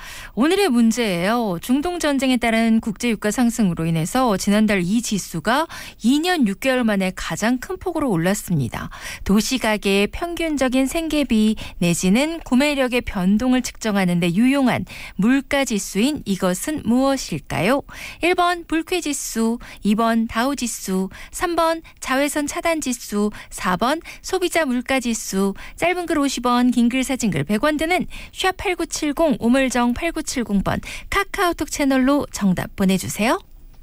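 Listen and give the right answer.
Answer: 4: 소비자 물가지수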